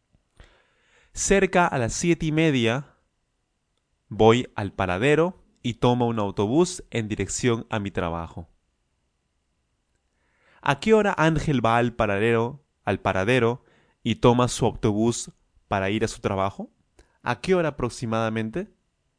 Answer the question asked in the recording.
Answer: Cerca a las siete y media a.m.